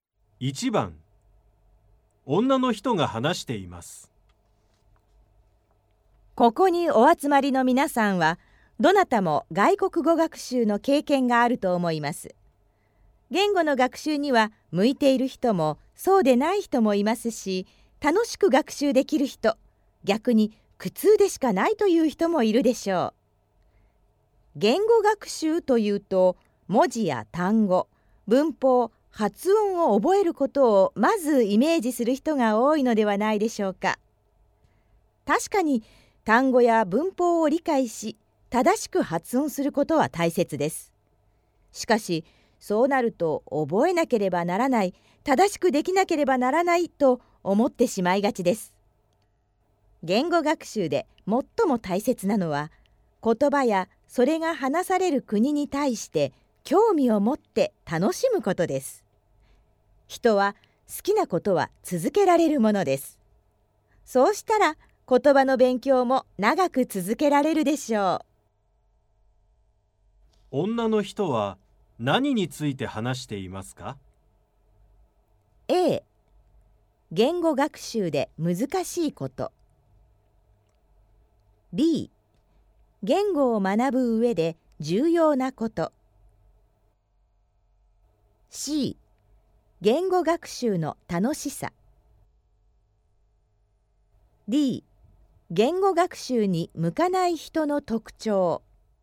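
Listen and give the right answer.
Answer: B: 言語を学ぶ上で重要なこと。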